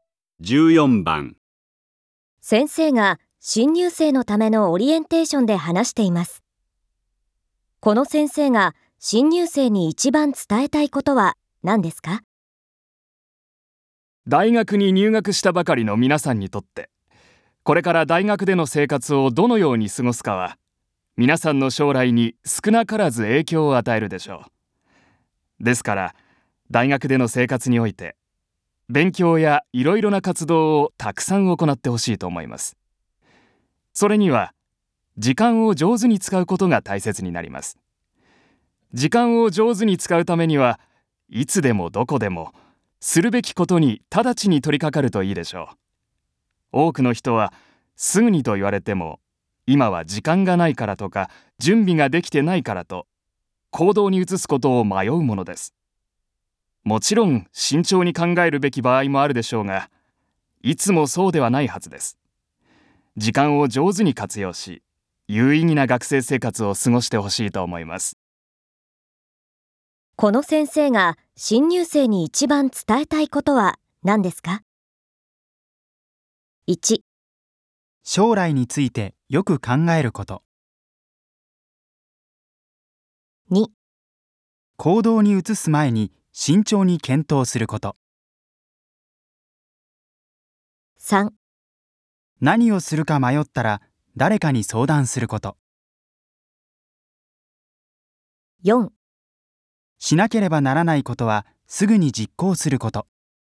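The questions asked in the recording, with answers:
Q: この先生が新入生に一番伝えたいことは何ですか?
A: 4: しなければならないことはすぐに実行すること。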